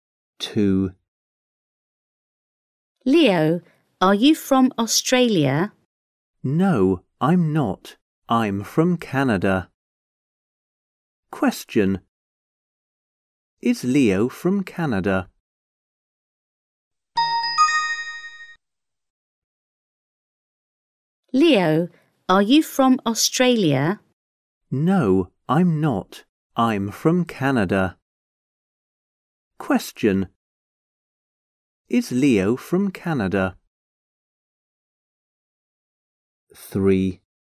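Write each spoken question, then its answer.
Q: Is Leo from Canada?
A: Yes, he is.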